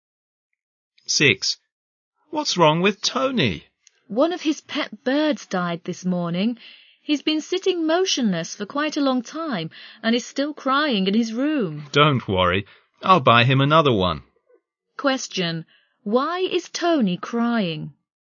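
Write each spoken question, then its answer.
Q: Why is Tony crying?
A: One of his pet birds died this morning.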